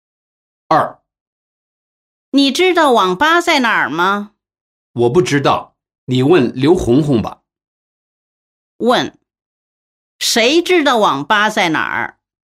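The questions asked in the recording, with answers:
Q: 谁知道网吧在哪儿?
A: 刘红红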